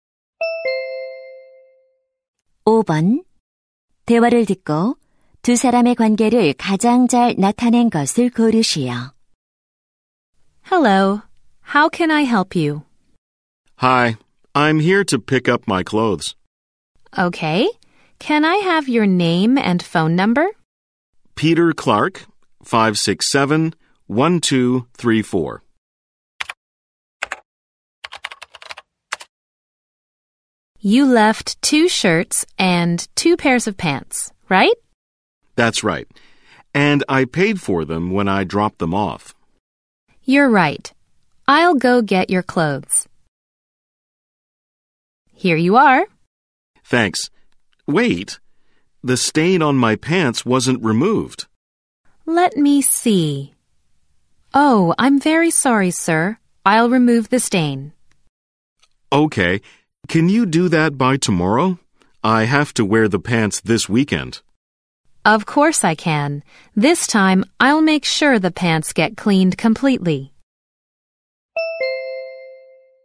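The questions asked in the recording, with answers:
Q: 대화를 듣고 두 사람의 관계를 가장 잘 나타낸 것을 고르시오.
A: 세탁소 직원과 손님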